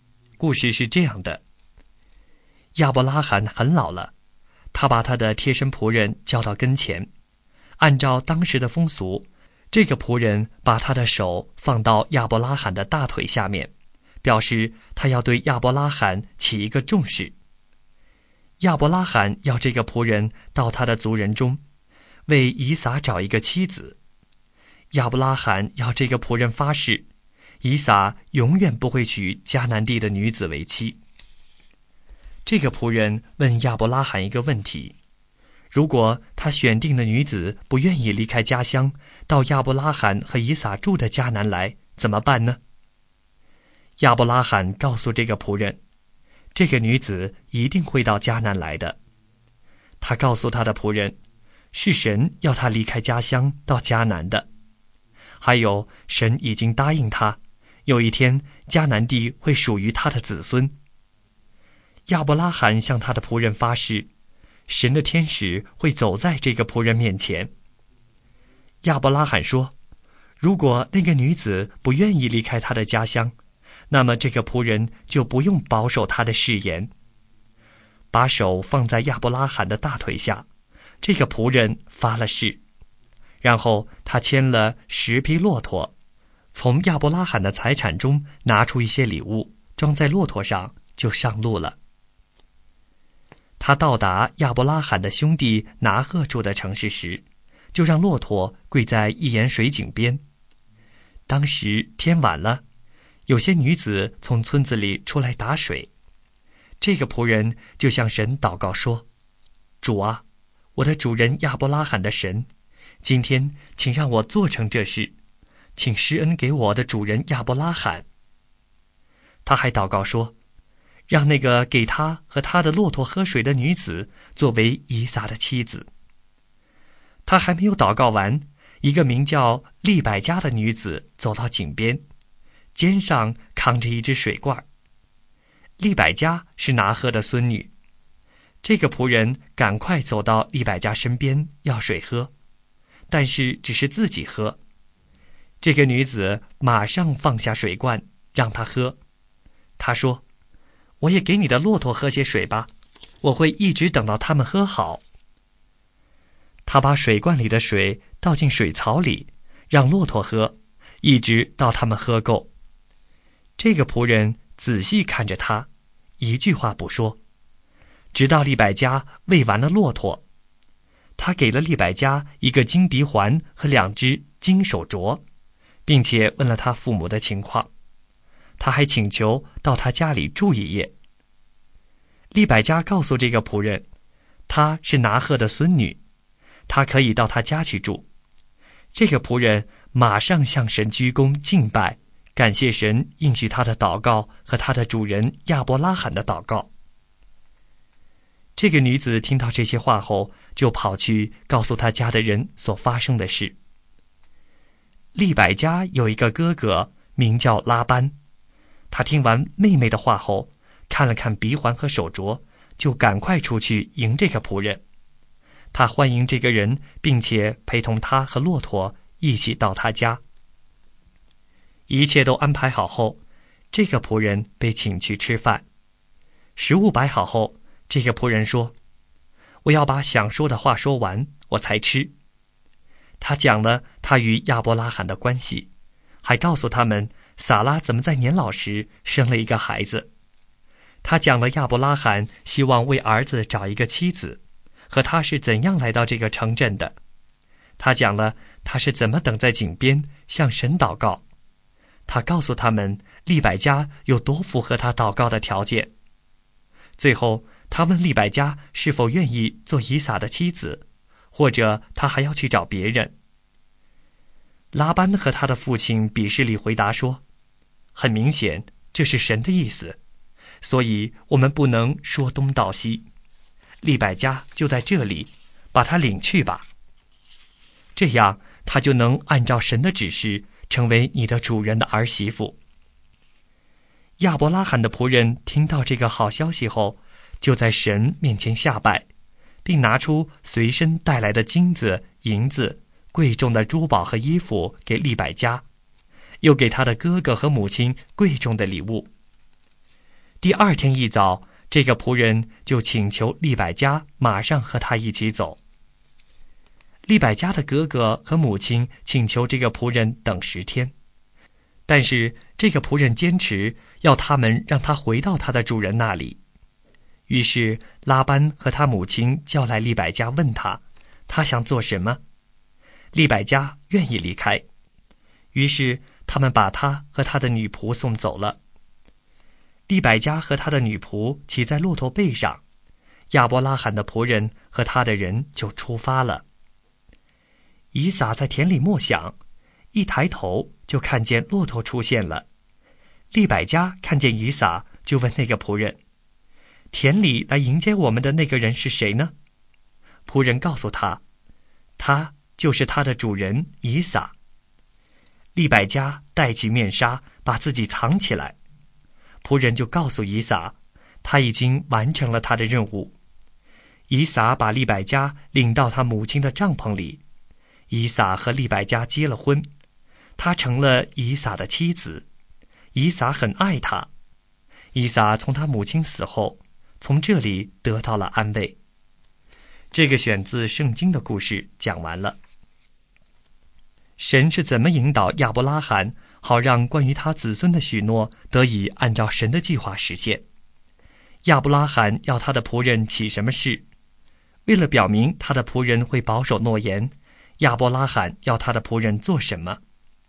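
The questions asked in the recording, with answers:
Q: 亚伯拉罕要他的仆人起什么誓?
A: 到亚伯拉罕的族人中为以撒找妻子,以撒永远不会娶迦南地的女子为妻

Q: 为了表明他的仆人会保守诺言,亚伯拉罕要他的仆人做什么?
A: 把手放在亚伯拉罕的大腿下面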